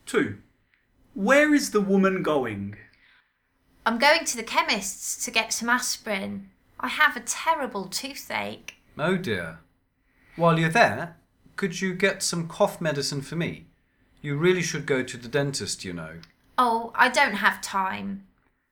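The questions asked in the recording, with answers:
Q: Where is the woman going?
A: To the chemist's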